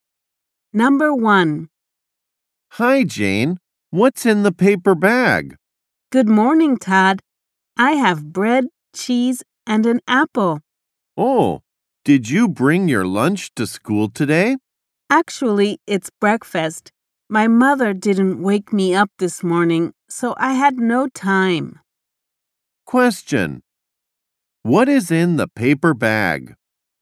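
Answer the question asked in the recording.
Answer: Bread, cheese, and an apple (her breakfast)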